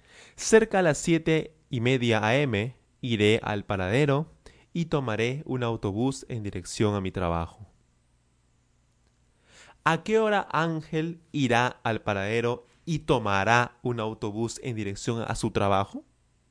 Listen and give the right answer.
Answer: Cerca a las 7 a.m. Oh, disculpen, cerca a las 7 y media a.m.